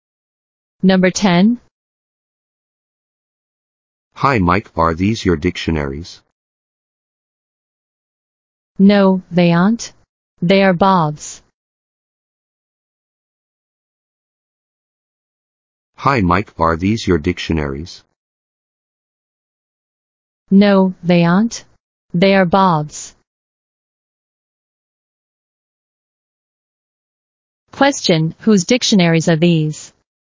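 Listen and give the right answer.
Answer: Bob's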